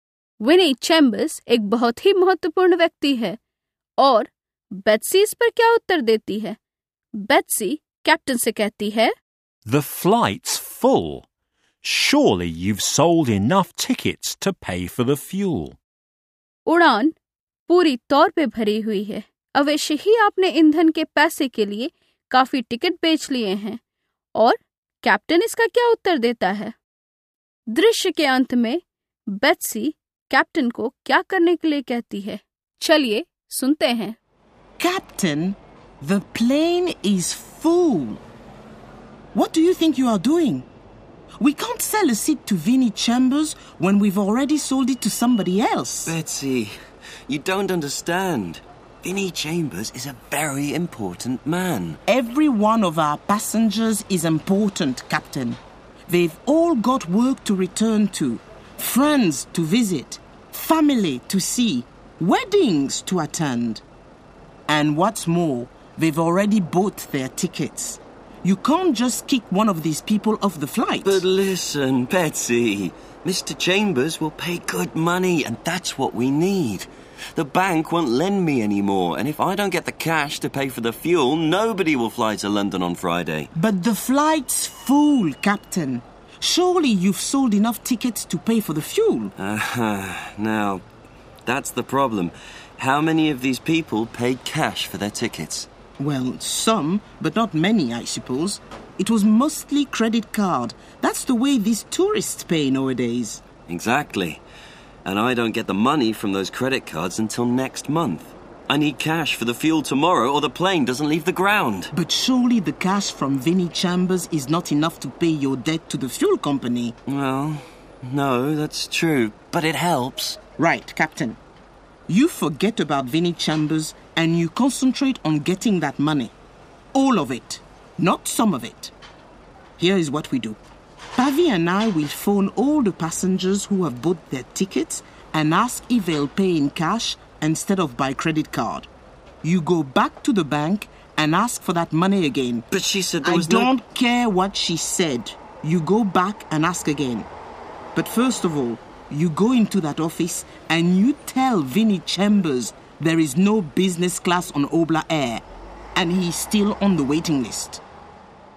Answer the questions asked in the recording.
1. I don't get the money from those credit cards until next month.
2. You go back into that office and you tell Vinnie Chambers there's no business class on Obla Air and he is on the waiting list.